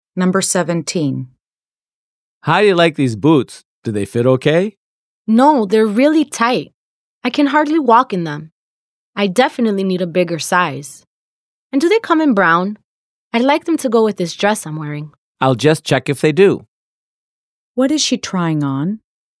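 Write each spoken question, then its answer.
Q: What is she trying on?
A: boots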